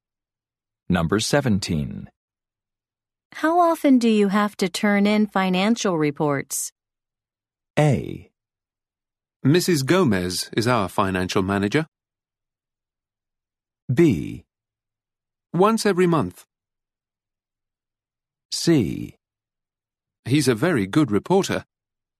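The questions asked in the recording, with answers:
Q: How often do you have to turn in financial reports?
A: B: Once every month.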